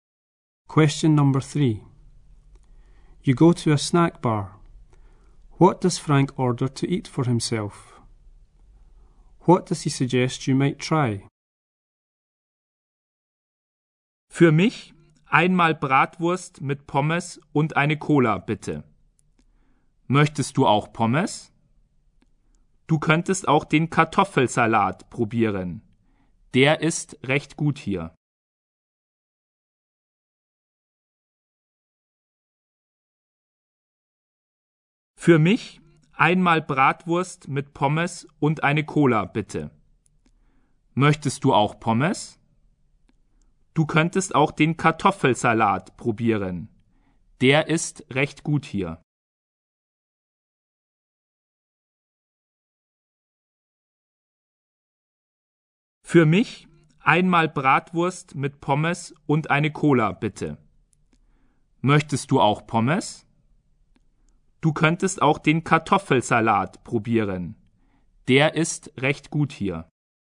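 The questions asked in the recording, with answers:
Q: What does Frank order to eat for himself?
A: Bratwurst with chips

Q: What does he suggest you might try?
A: The potato salad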